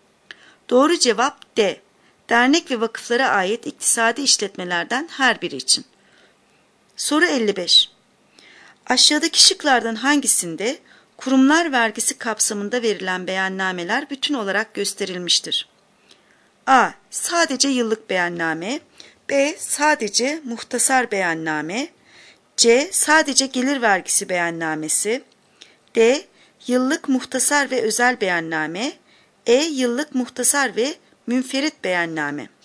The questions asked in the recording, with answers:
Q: Aşağıdaki şıklardan hangisinde kurumlar vergisi kapsamında verilen beyannameler bütün olarak gösterilmiştir?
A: Doğru cevap D. Yıllık muhtasar ve özel beyanname.